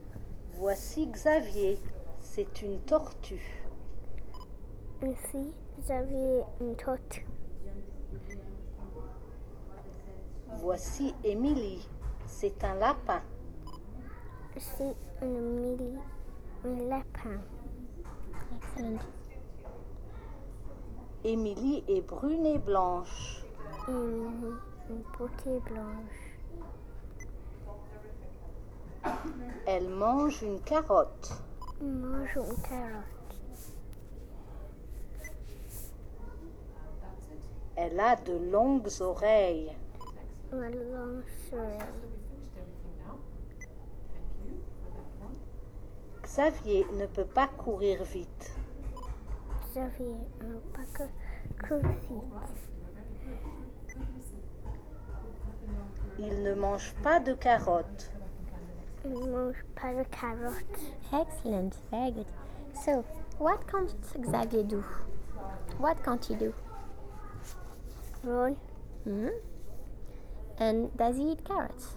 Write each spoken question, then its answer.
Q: So, what can't Xavier do?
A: Run.

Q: And does he eat carrots?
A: No.